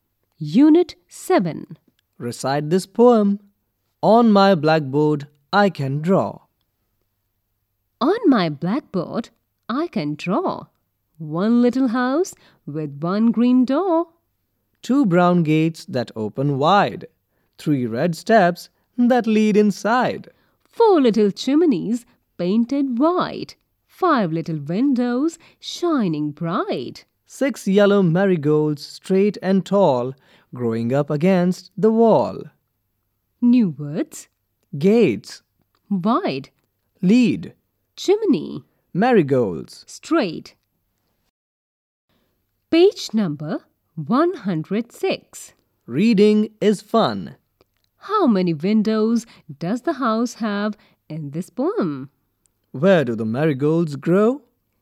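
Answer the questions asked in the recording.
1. Five
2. Up against the wall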